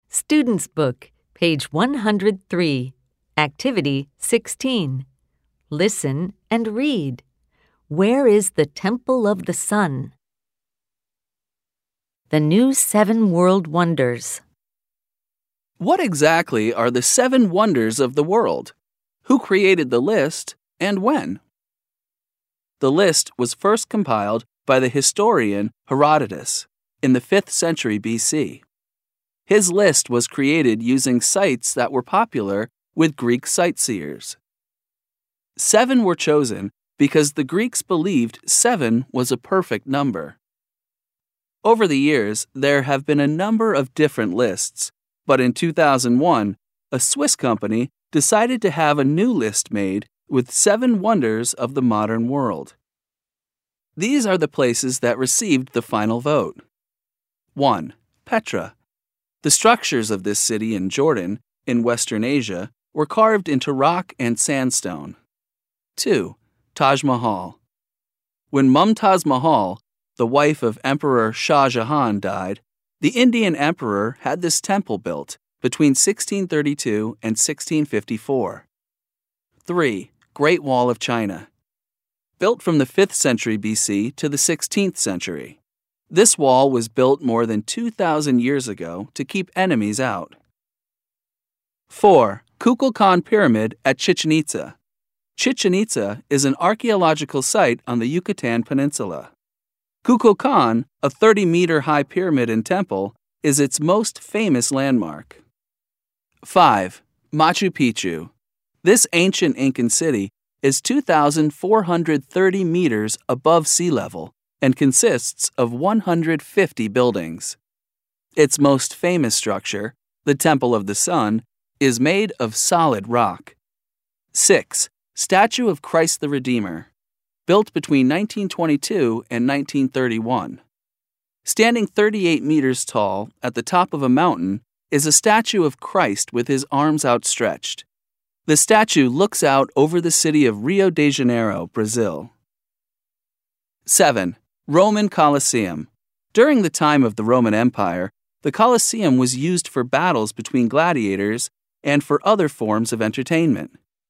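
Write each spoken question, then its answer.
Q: Where is the Temple of the Sun?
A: In Machu Picchu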